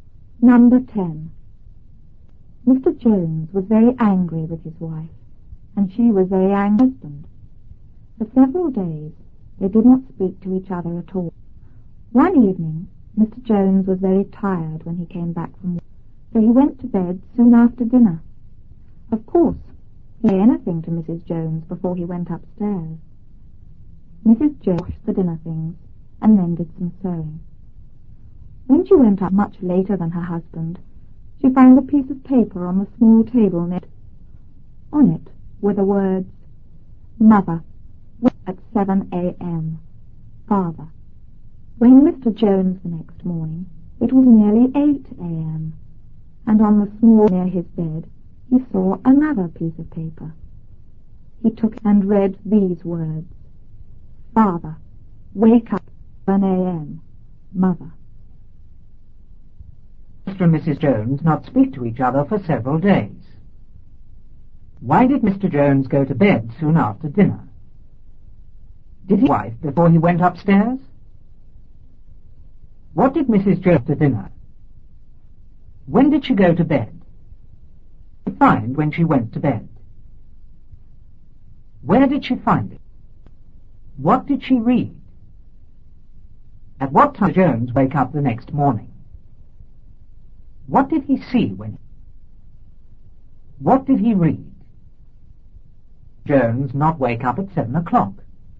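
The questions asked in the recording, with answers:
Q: Mr. and Mrs. Jones not speak to each other for several days.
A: Because they were very angry with each other

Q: Why did Mr. Jones go to bed soon after dinner?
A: Because he was very tired

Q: What did Mrs. Jones after dinner?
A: She washed the dinner things and did some sewing

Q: When did she go to bed?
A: Much later than her husband

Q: What did she find when she went to bed?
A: A piece of paper

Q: Where did she find it?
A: On the small table next to her

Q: What did she read?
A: "Mother, wake me at 7 a.m. Father."

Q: At what time did Jones wake up the next morning?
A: Nearly 8 a.m.

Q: What did he see when he...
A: Another piece of paper on the small table near his bed

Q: What did he read?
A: "Father, wake up at 7 a.m. Mother."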